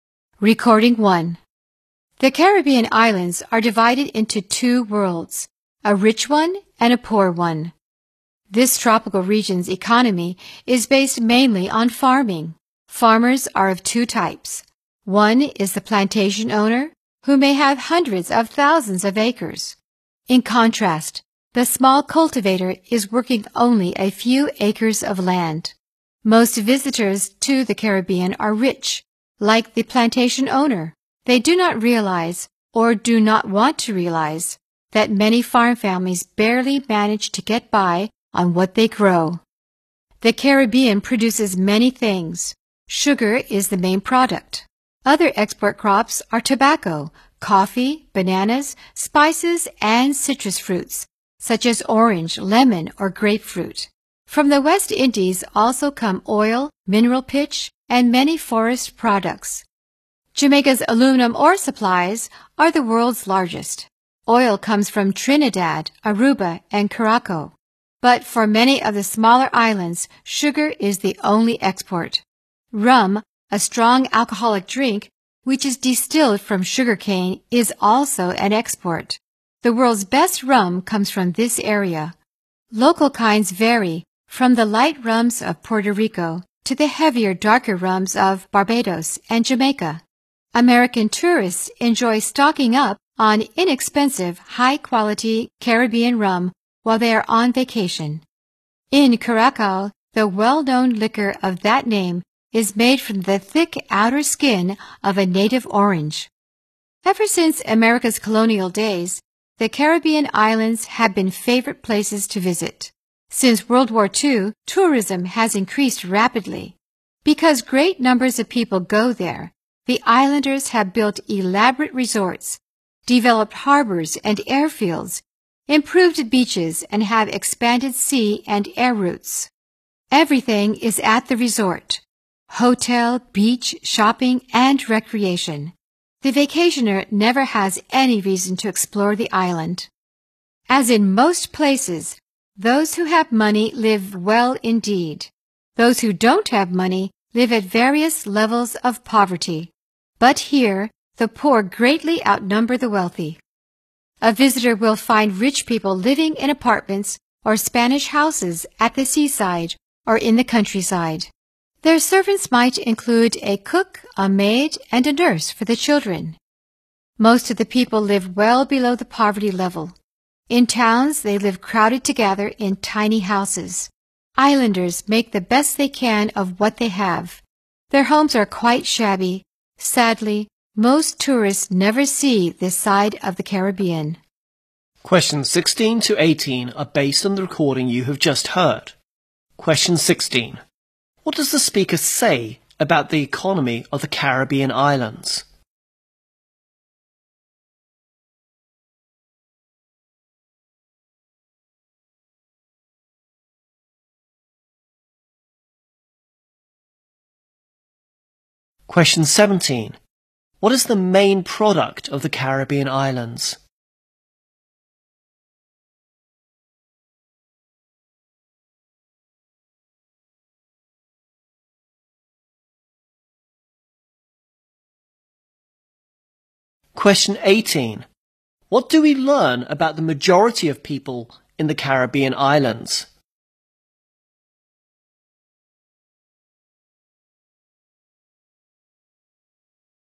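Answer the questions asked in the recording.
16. It is based mainly on farming.
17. Sugar.
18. They live well below the poverty level.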